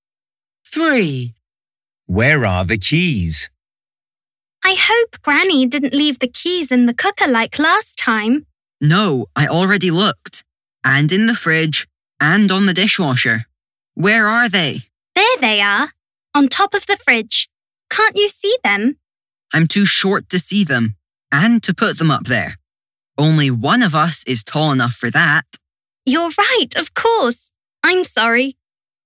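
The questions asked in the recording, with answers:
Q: Where are the keys?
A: On top of the fridge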